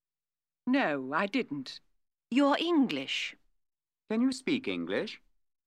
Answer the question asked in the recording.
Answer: Yes, I can.